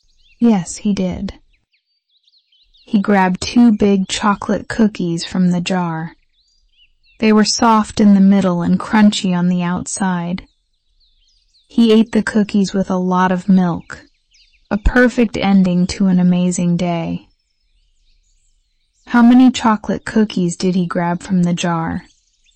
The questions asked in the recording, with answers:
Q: How many chocolate cookies did he grab from the jar?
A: Two. He grabbed two chocolate cookies.